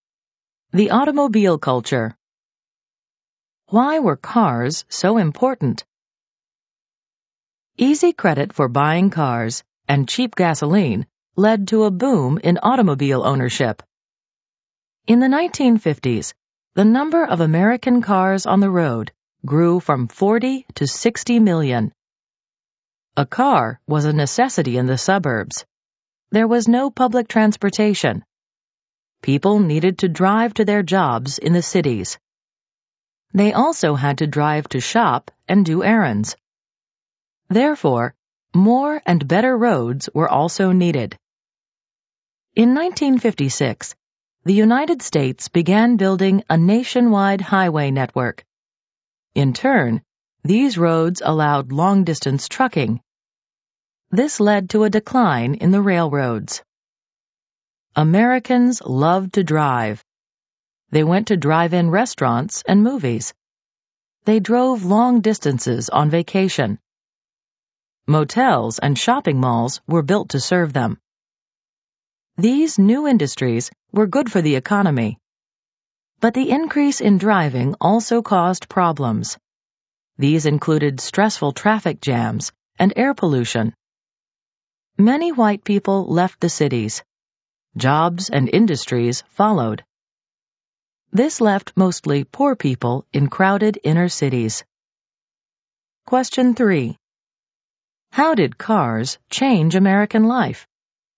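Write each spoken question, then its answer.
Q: How did cars change American life?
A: Cars became necessary in the suburbs, which led to a national highway network, long-distance trucking, motels, malls and drive-ins. They also caused traffic jams, air pollution, a decline in railroads and poorer inner cities.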